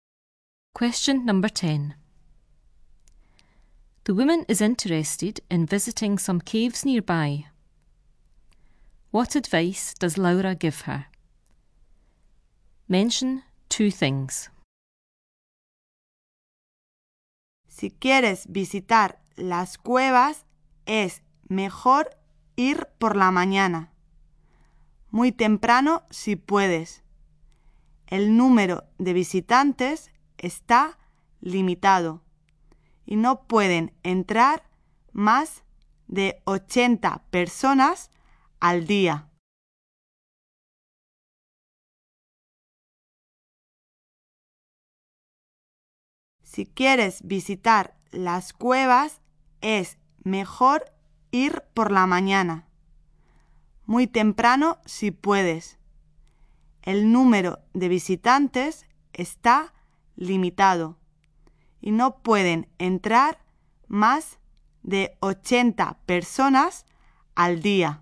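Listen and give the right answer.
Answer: Go in the morning, very early; visitors are limited to 80 people a day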